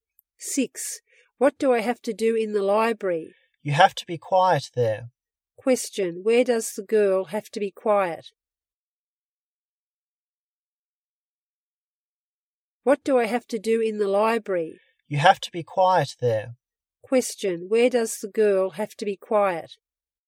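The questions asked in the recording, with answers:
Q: where does the girl have to be quiet?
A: In the library.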